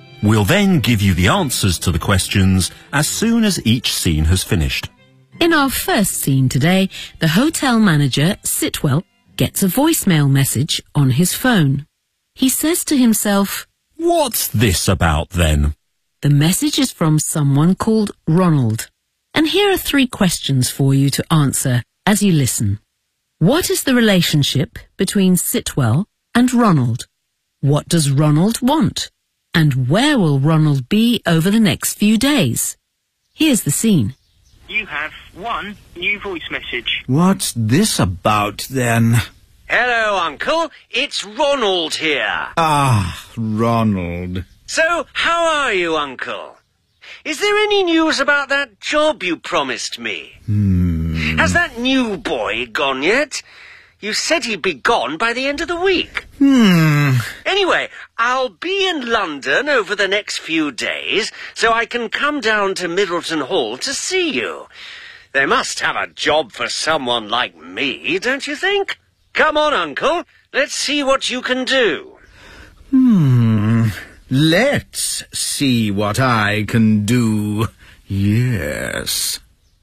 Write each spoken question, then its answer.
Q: What is the relationship between Sitwell and Ronald?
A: So, Sitwell is Ronald's uncle.

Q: What does Ronald want?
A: He wants a job at Middleton Hall.

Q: And where will Ronald be over the next few days?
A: I'll be in London over the next few days, so I can come down to Middleton Hall to see you.